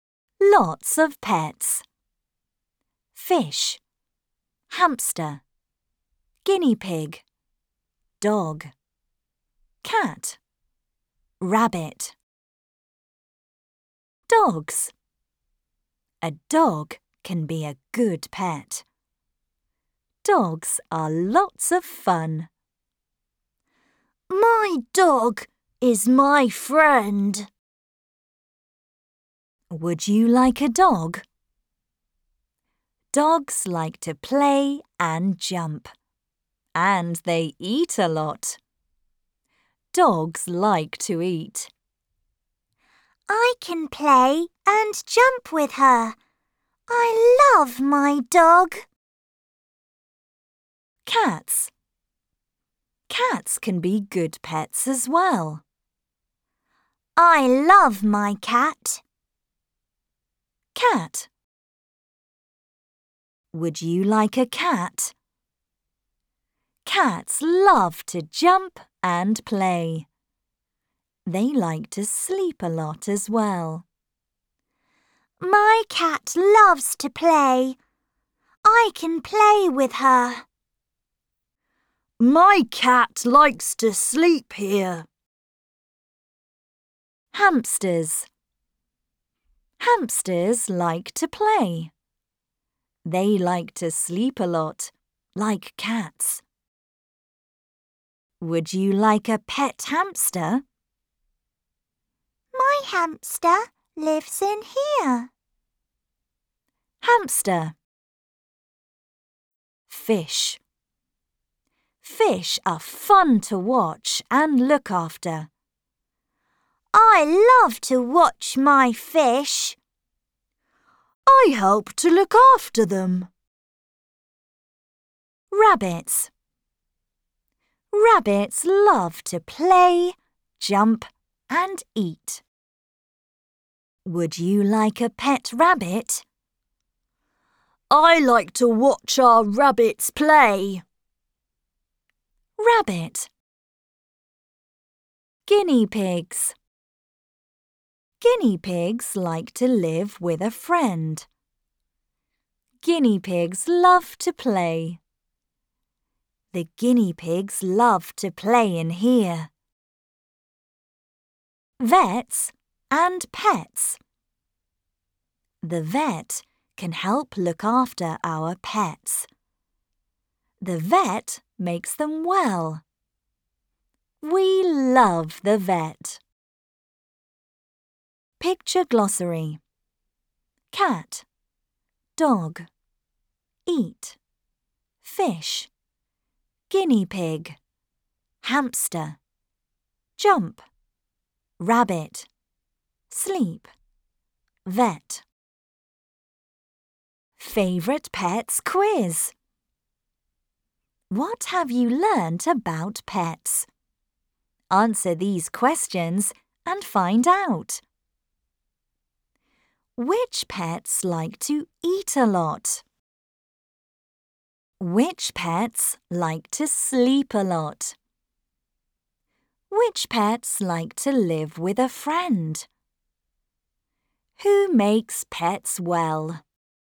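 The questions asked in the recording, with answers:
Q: Which pets like to eat a lot?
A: Dogs

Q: Which pets like to sleep a lot?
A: Cats and hamsters

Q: Which pets like to live with a friend?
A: Guinea pigs

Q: Who makes pets well?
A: The vet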